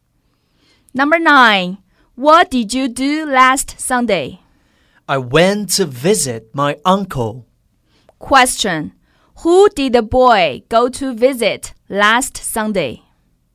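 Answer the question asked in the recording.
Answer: His uncle.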